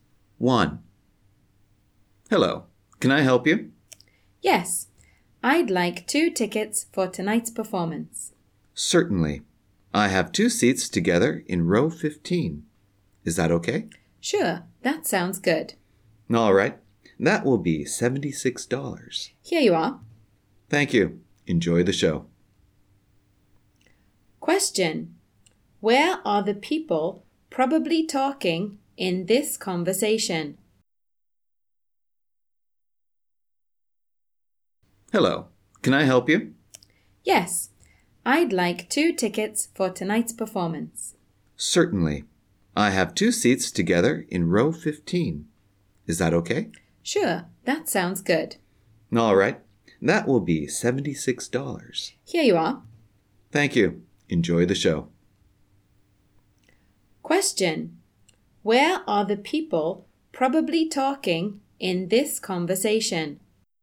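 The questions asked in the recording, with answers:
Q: Where are the people probably talking in this conversation?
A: At a theater ticket counter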